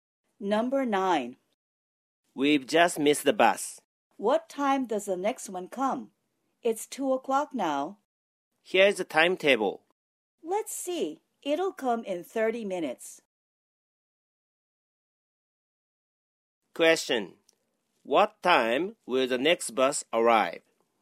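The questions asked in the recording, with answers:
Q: What time will the next bus arrive?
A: 2:30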